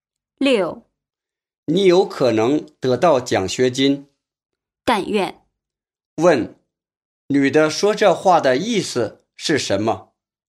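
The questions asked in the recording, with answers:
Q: 女的说这话的意思是什么?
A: 她希望能得到奖学金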